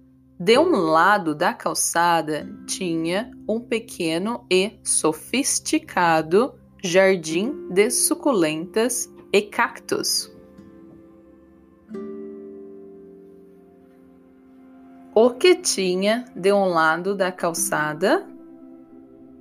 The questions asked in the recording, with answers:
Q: O que tinha de um lado da calçada?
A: pequeno e sofisticado jardim de suculentas e cactos.